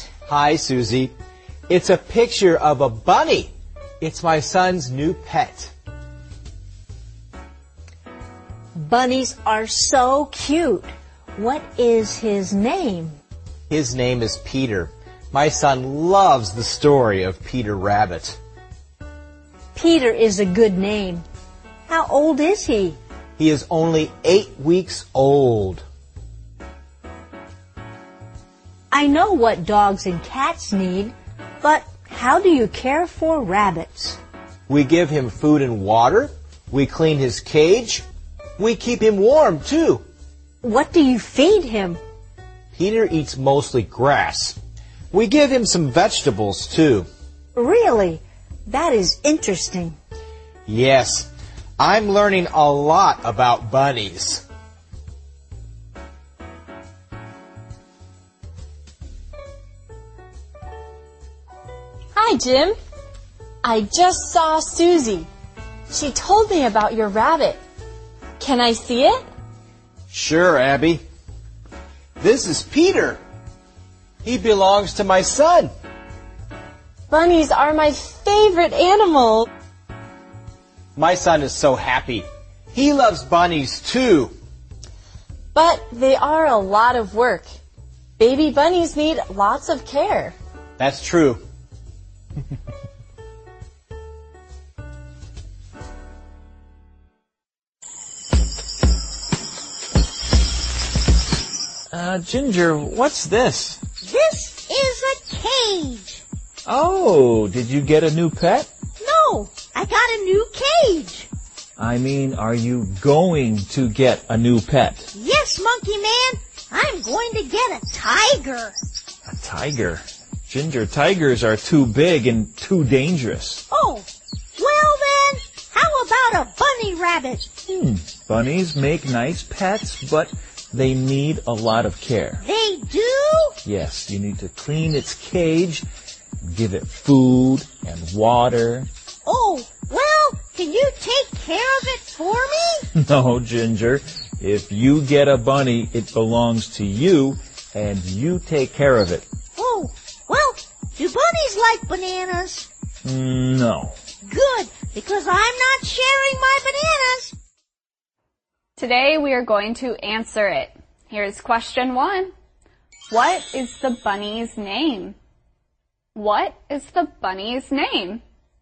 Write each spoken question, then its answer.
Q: What is the bunny's name?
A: The bunny's name is Peter.